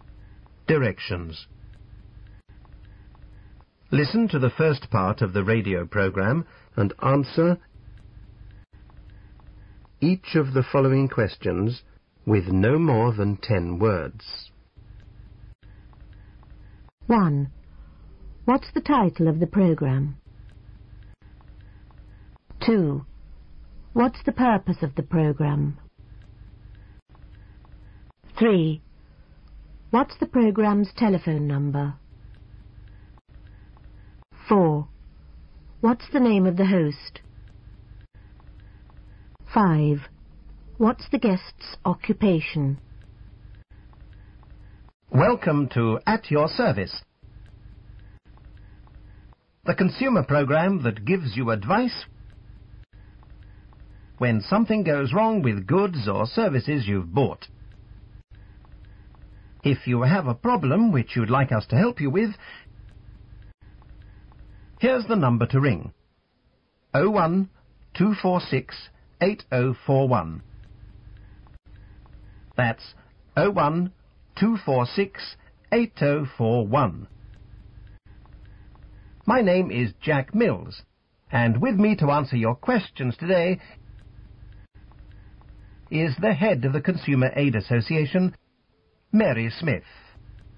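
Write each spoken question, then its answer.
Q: What's the title of the program?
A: At Your Service

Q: What's the purpose of the program?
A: To give consumers advice when something goes wrong with goods or services they've bought

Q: What's the program's telephone number?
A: 01-246-8041

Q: What's the name of the host?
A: Jack Mills

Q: What's the guest's occupation?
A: Head of the Consumer Aid Association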